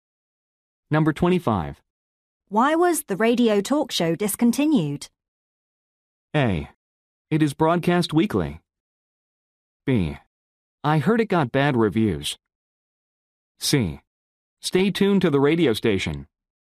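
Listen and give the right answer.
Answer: B: I heard it got bad reviews.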